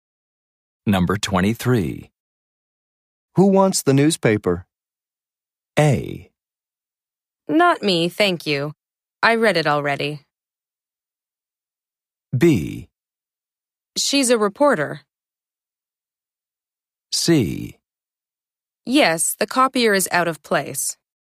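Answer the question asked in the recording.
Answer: A: Not me, thank you. I read it already.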